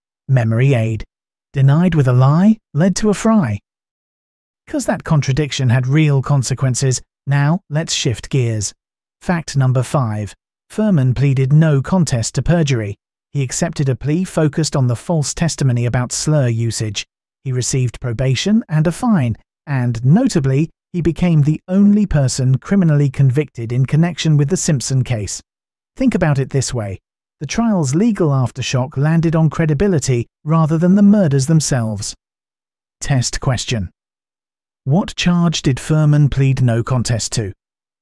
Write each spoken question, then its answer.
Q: What charge did Fuhrman plead no contest to?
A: Correct answer. Perjury.